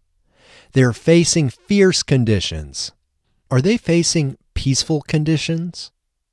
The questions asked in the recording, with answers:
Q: Are they facing peaceful conditions?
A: No, they aren't facing peaceful conditions.